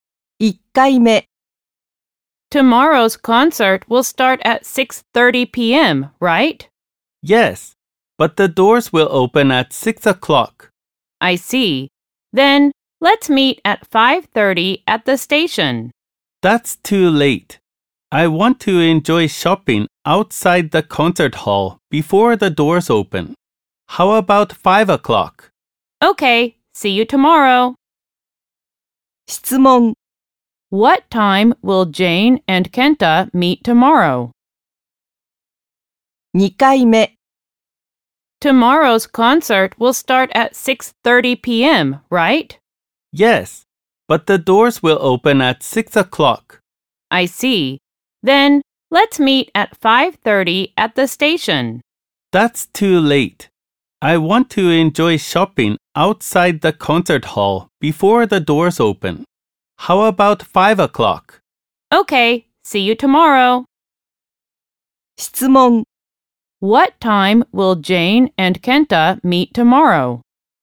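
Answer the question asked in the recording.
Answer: At 5 o'clock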